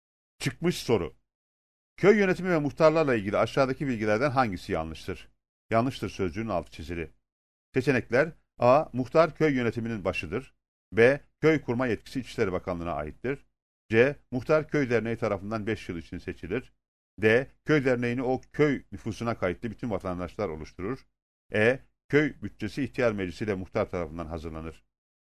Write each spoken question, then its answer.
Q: Köy yönetimi ve muhtarlarla ilgili aşağıdaki bilgilerden hangisi yanlıştır?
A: Doğru cevap D seçeneğidir.